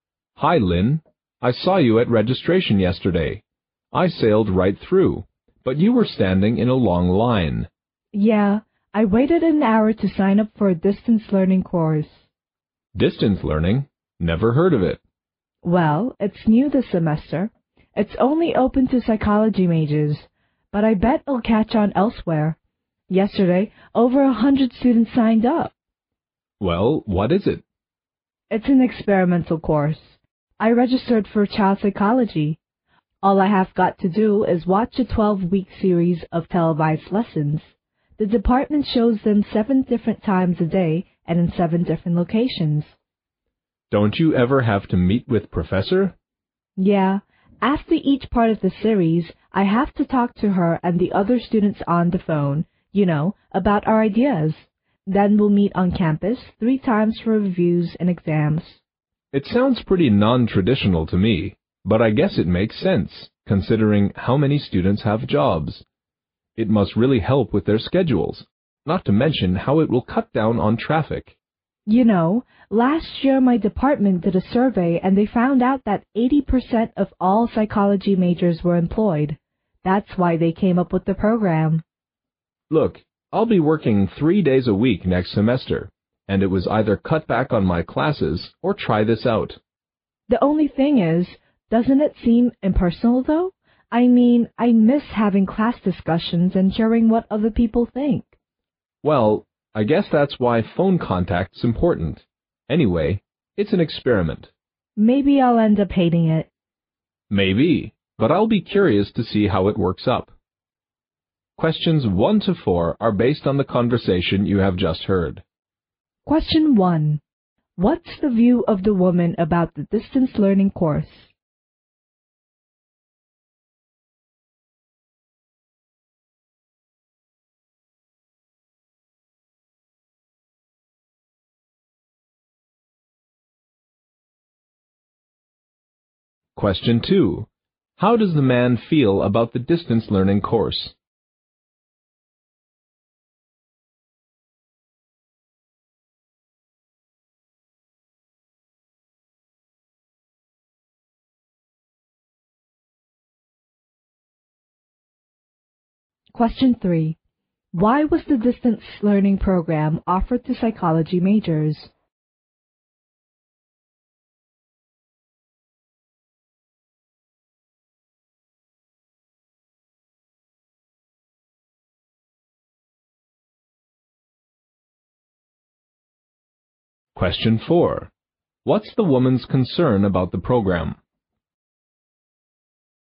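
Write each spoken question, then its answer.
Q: Why was the distance learning program offered to psychology majors?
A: Because a survey found 80% of psychology majors were employed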